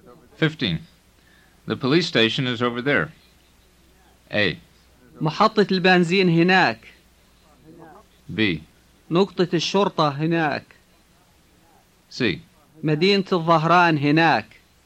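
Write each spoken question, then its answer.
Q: The police station is over there.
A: B: نقطة الشرطة هناك.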